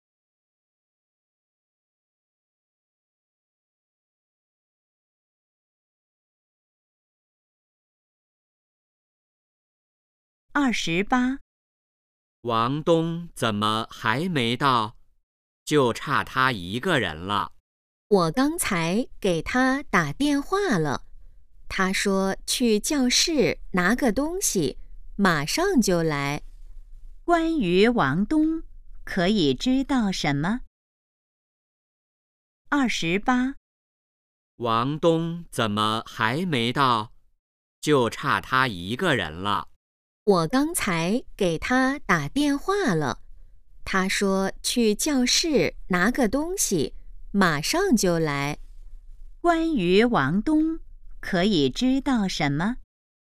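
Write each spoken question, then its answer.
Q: 关于王东,可以知道什么?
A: 他去教室拿东西了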